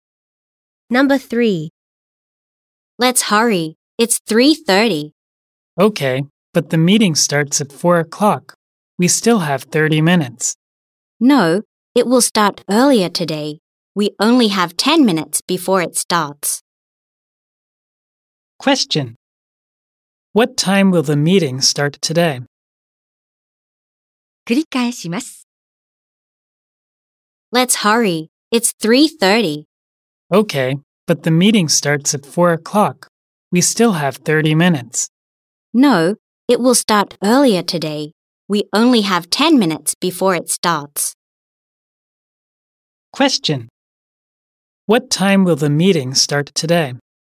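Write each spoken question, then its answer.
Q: What time will the meeting start today?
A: 3:40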